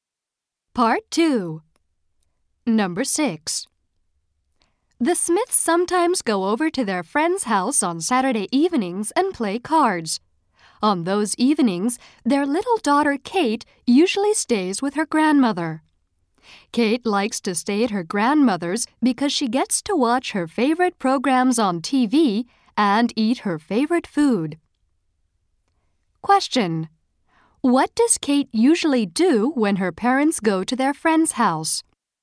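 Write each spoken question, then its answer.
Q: What does Kate usually do when her parents go to their friend's house?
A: She stays with her grandmother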